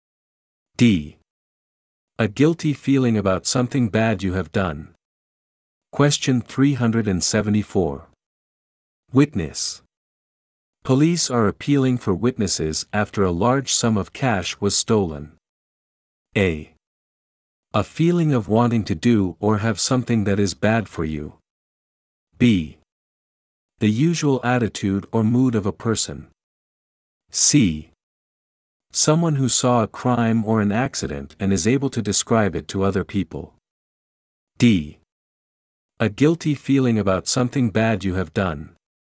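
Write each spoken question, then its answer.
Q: Witness. Police are appealing for witnesses after a large sum of cash was stolen.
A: C: Someone who saw a crime or an accident and is able to describe it to other people.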